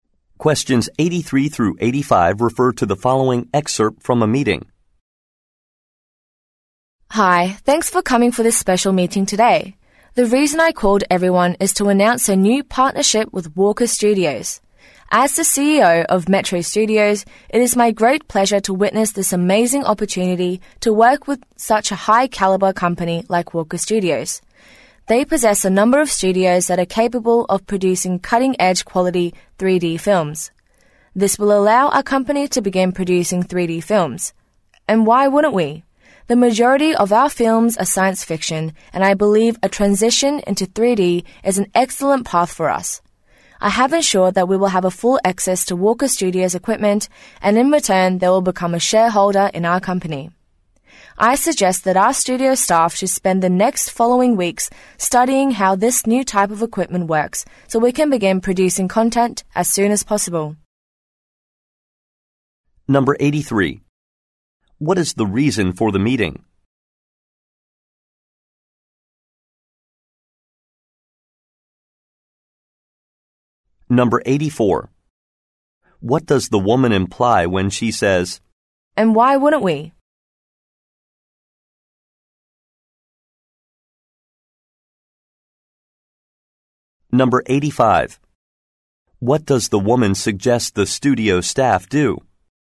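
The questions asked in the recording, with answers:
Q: What is the reason for the meeting?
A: To announce a new partnership with Walker Studios

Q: What does the woman suggest the studio staff do?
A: Study how the new equipment works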